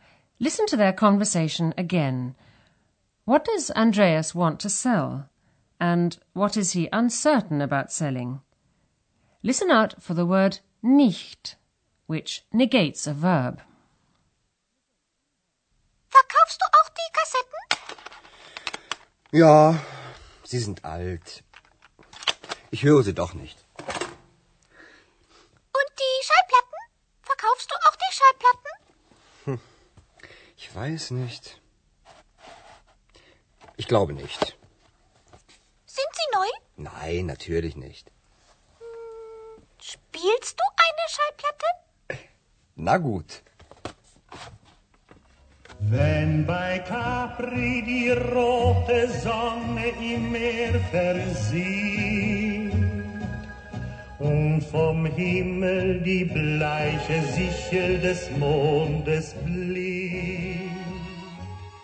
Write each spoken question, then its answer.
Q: What does Andreas want to sell?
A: Andreas wants to sell his cassettes

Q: And what is he uncertain about selling?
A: but he's not sure whether he should also sell his records.